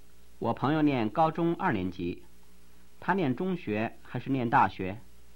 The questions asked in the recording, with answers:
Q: 他念中学还是念大学?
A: 他念中学。